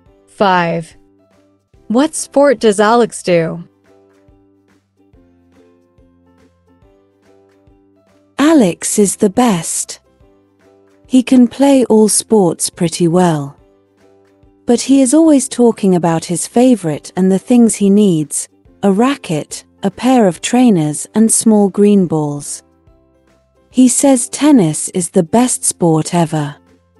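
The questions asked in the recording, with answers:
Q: What sport does Alex do?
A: tennis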